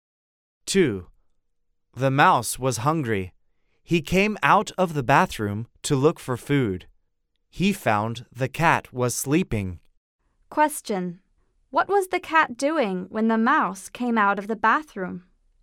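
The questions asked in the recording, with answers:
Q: What was the cat doing when the mouse came out of the bathroom?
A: He was sleeping.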